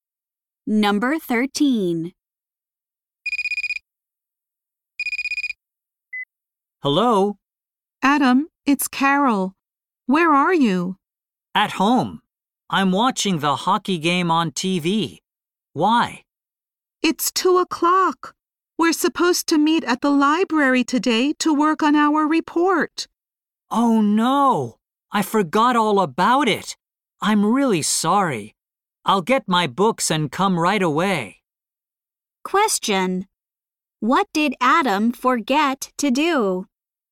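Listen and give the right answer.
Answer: Meet Carol at the library to work on their report.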